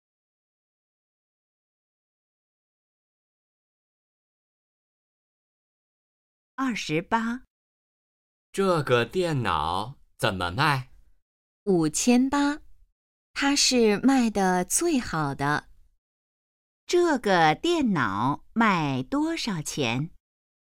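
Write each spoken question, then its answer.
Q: 这个电脑卖多少钱?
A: 5800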